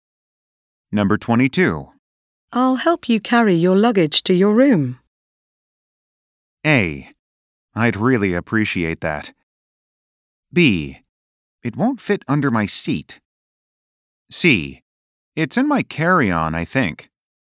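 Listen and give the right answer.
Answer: A: I'd really appreciate that.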